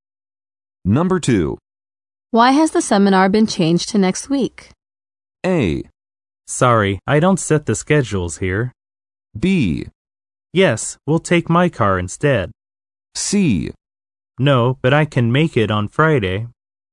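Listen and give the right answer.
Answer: A: Sorry, I don't set the schedules here.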